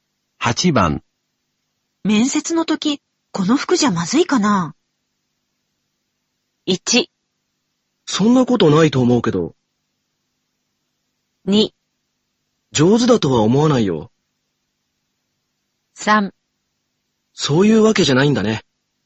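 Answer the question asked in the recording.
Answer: 1: そんなことないと思うけど。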